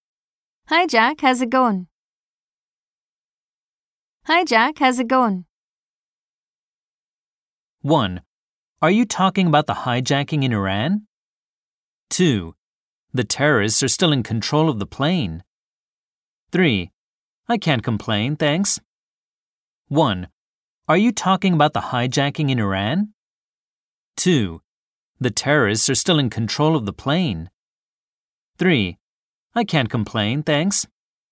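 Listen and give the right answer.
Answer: 3: I can't complain, thanks.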